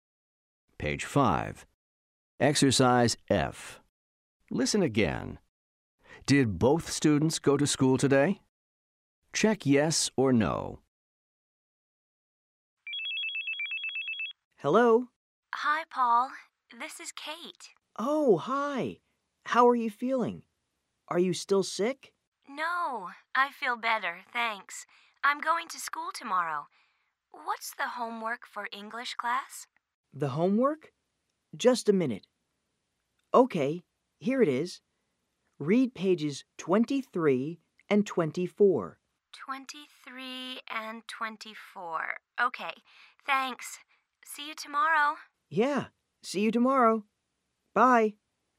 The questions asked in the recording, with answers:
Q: Did both students go to school today?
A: The answer is no. Kate was sick today.